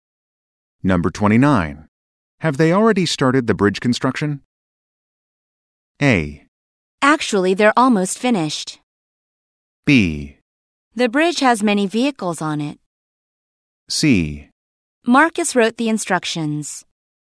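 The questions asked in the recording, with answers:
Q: Have they already started the bridge construction?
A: A: Actually, they're almost finished.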